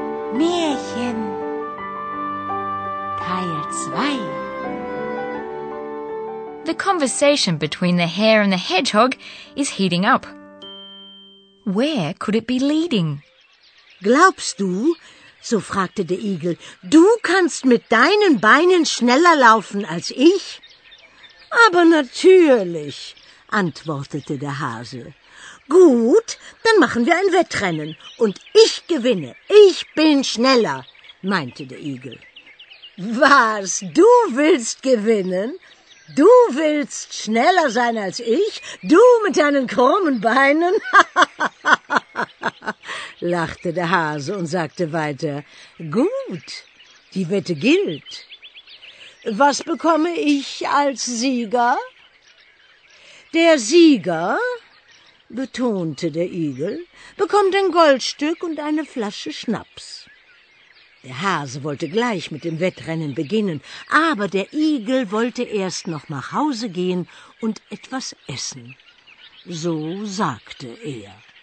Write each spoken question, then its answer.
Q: Where could it be leading?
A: The conversation leads to a bet, so you're sure to have understood the key words.